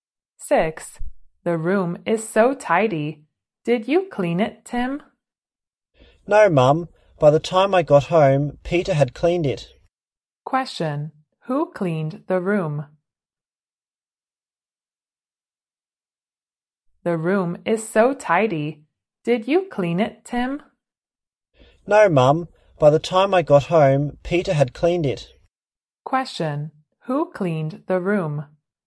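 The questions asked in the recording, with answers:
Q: Who cleaned the room?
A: Peter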